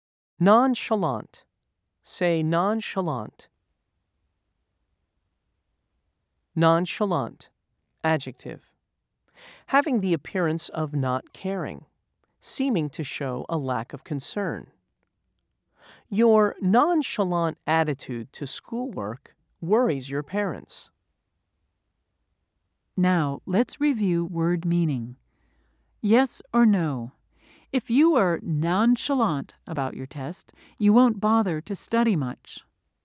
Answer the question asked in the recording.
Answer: If you said yes, you are correct.